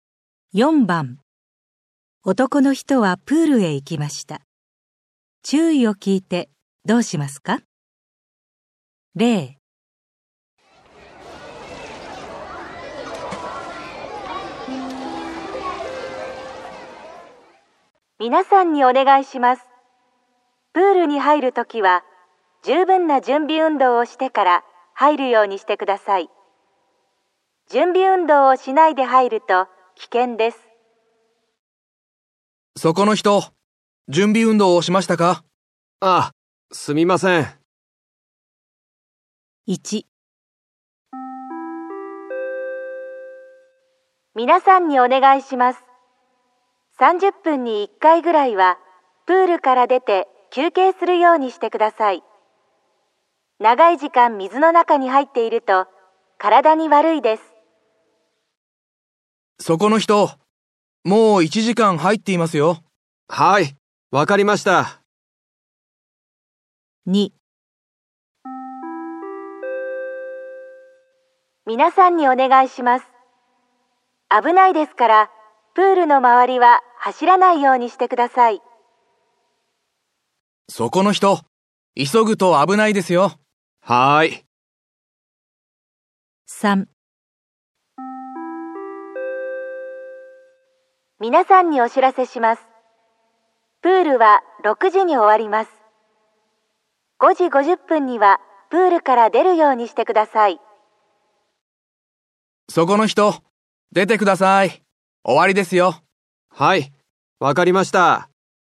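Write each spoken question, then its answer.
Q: 男の人はプールへ行きました。注意を聞いてどうしますか?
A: プールから出て休憩する

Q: 男の人はプールへ行きました。注意を聞いてどうしますか?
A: プールの周りを走らないで歩く

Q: 男の人はプールへ行きました。注意を聞いてどうしますか?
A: プールから出る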